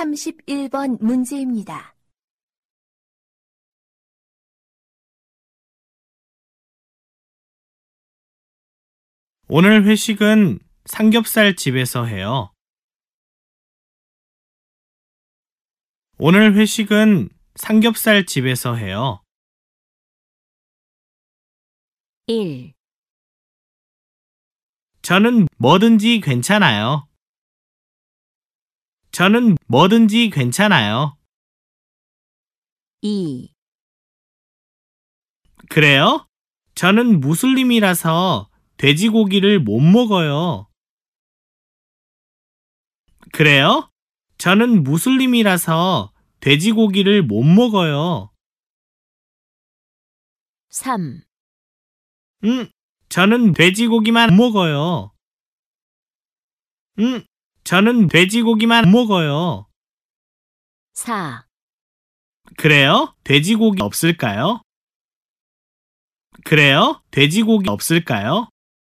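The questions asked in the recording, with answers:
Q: 오늘 회식은 삼겹살 집에서 해요.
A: 2: 그래요? 저는 무슬림이라서 돼지고기를 못 먹어요.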